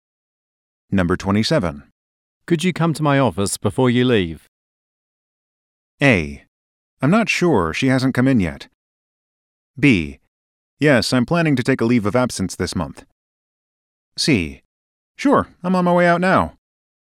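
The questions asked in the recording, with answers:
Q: Could you come to my office before you leave?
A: C: Sure, I'm on my way out now.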